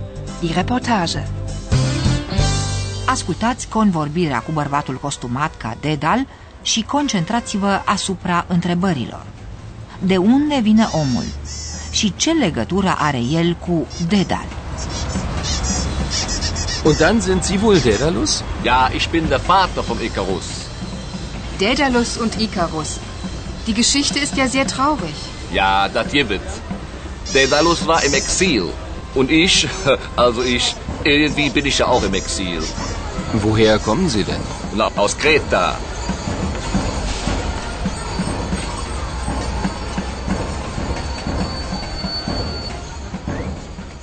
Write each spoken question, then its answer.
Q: De unde vine omul?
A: Creta De acolo vine omul, cel puțin așa spune, din Creta, unde a fost și Dedal.

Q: Și ce legătură are el cu Dedal?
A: Acest fapt îl leagă pe omul nostru de figura lui Dedal.